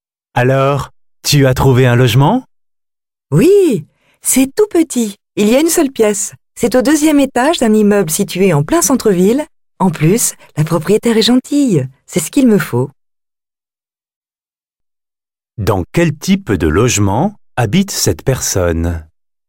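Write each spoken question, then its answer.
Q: Dans quel type de logement habite cette personne ?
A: Un studio (un petit appartement d'une seule pièce, au deuxième étage d'un immeuble en centre-ville)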